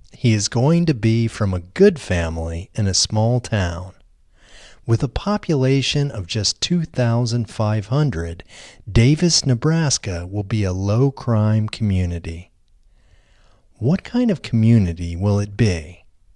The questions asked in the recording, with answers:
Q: What kind of community will it be?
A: It will be a low-crime community.